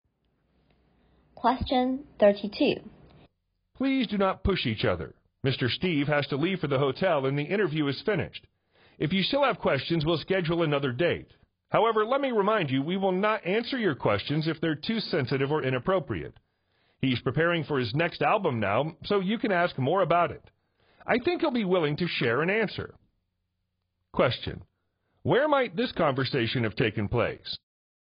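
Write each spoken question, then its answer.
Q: Where might this conversation have taken place?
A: At a press conference (an interview with a singer)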